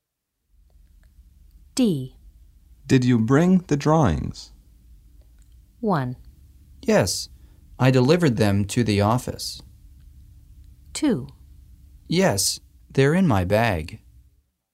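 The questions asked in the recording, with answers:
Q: Did you bring the drawings?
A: 2: Yes, they're in my bag.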